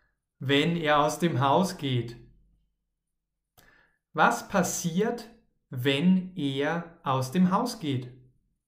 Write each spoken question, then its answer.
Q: Was passiert, wenn er aus dem Haus geht?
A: Dann beginnt es zu regnen.